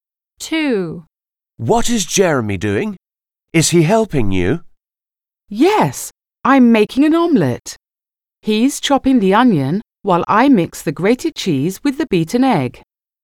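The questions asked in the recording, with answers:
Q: What is Jeremy doing?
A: Chopping the onion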